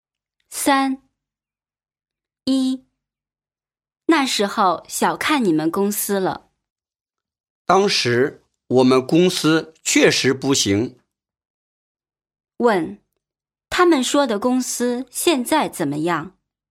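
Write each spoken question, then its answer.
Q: 他们说的公司现在怎么样?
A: 现在发展得很好了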